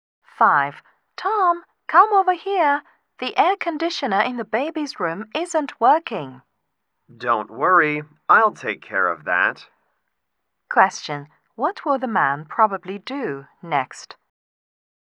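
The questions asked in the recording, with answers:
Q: What will the man probably do next?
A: Fix the air conditioner in the baby's room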